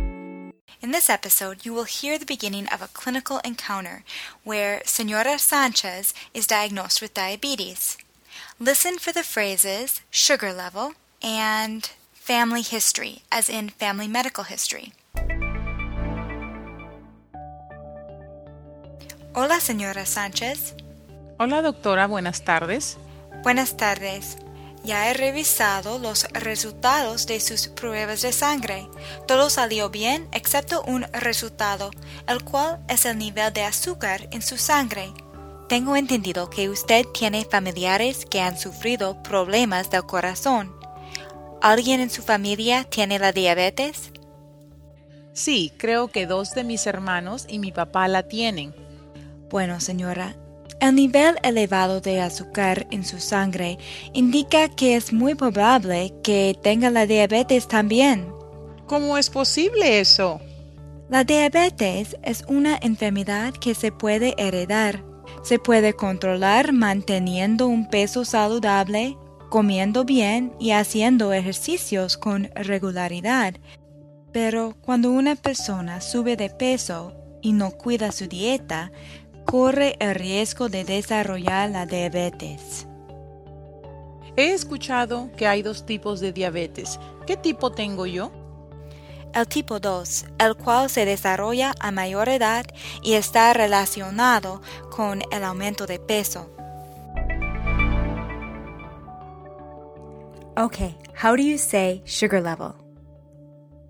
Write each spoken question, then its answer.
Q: Okay, how do you say sugar level?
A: El nivel de azúcar.